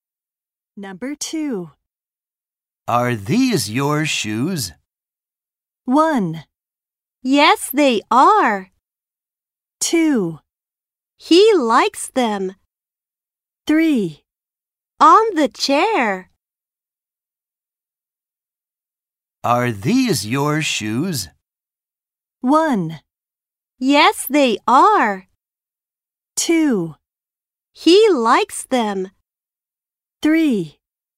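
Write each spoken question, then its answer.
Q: Are these your shoes?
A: 1: Yes, they are.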